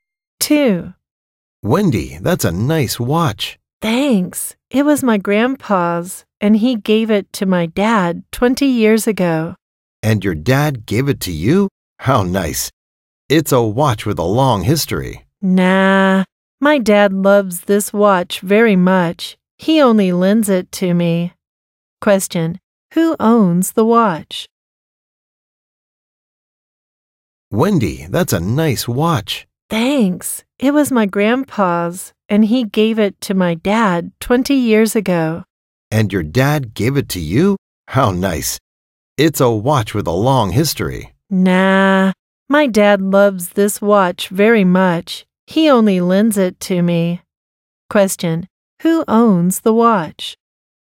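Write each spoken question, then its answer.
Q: Who owns the watch?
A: Wendy's dad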